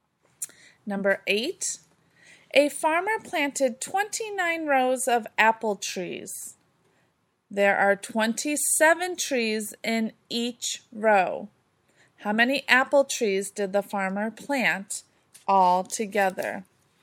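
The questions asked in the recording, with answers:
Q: How many apple trees did the farmer plant all together?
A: 783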